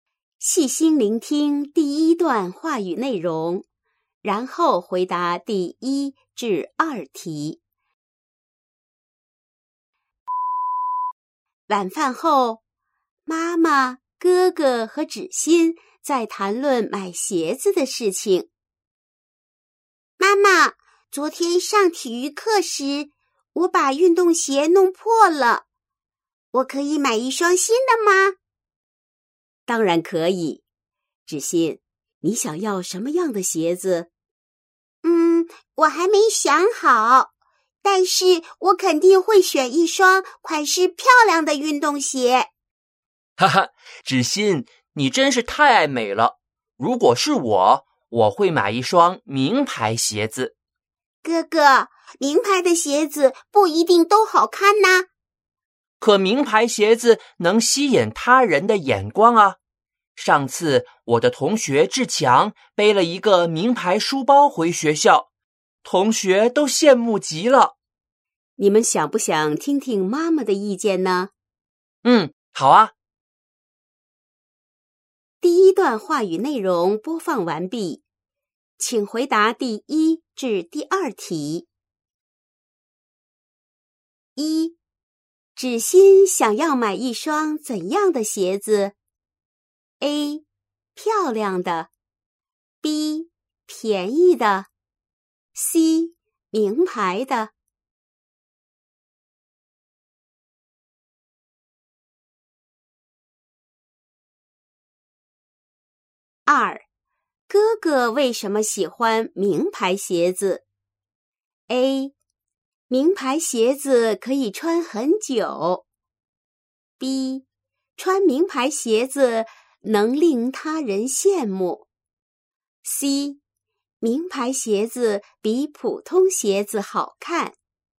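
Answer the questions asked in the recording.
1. A: 漂亮的
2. B: 穿名牌鞋子能令他人羡慕。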